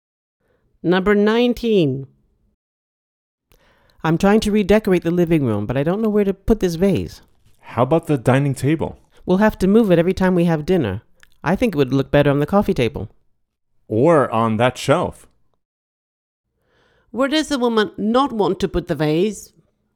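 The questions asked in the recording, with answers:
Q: Where does the woman not want to put the vase?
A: On the dining table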